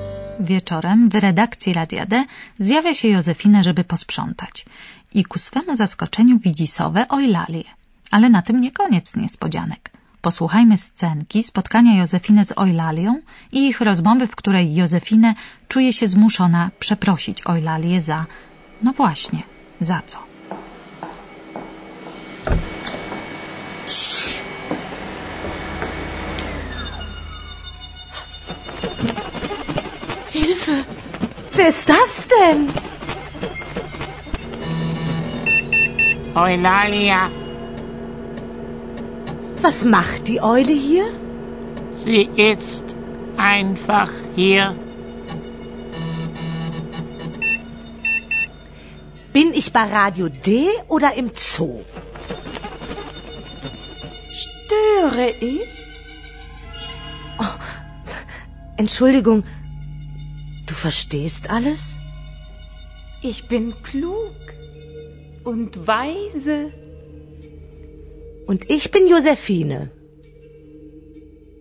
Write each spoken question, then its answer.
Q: posłuchajmy scenki spotkania Józefiny z Eulalią i ich rozmowy, w której Józefinę czuje się zmuszona przeprosić Eulalię za... No właśnie, za co?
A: Józefinę przeprasza Eulalię za to, że nie wiedziała, że rozumie ona ludzką mowę i że w ogóle wszystko rozumie